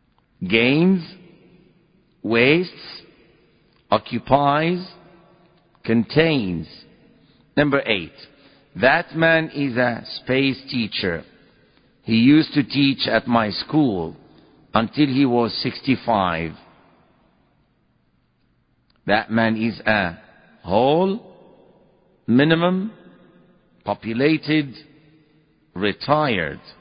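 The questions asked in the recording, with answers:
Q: That man is a space teacher.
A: D: retired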